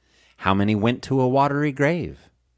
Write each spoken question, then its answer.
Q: How many went to a watery grave?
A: 1,517 went to a watery grave.